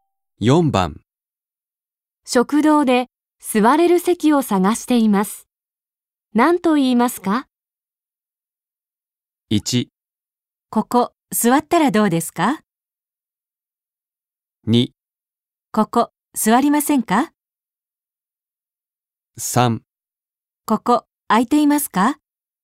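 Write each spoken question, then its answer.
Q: 食堂で座れる席を探しています。何と言いますか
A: 3: ここ空いていますか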